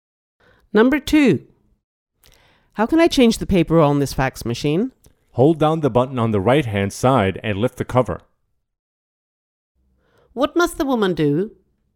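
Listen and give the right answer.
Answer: hold down the button on the right-hand side and lift the cover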